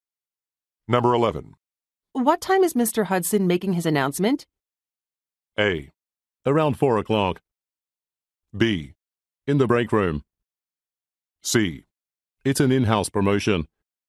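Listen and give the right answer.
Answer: A: Around 4 o'clock.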